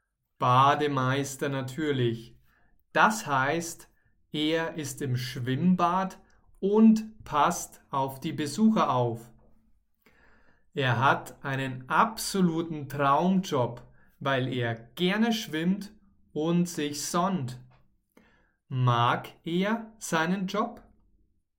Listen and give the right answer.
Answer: Ja, er mag seinen Job. Er hat einen absoluten Traumjob.